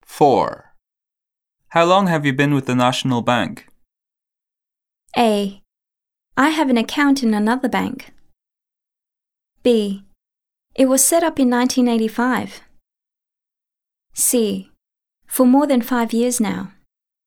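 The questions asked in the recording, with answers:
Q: How long have you been with the National Bank?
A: C: For more than 5 years now.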